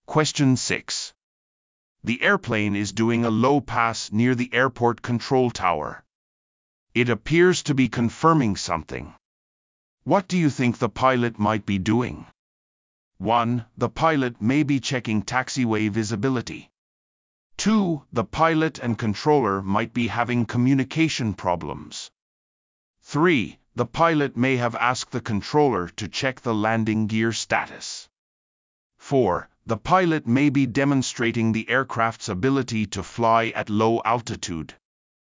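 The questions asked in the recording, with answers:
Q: What do you think the pilot might be doing?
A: 3: The pilot may have asked the controller to check the landing gear status.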